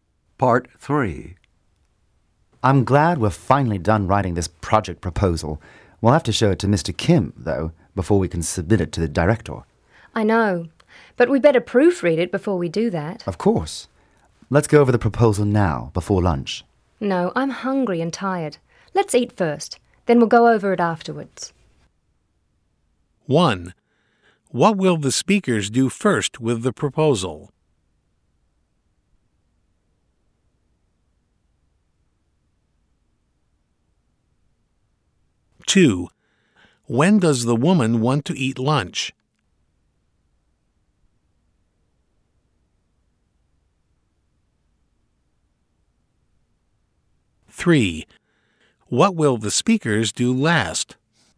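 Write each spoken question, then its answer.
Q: What will the speakers do first with the proposal?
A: Proofread it

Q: When does the woman want to eat lunch?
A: Before going over the proposal

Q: What will the speakers do last?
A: Submit it to the director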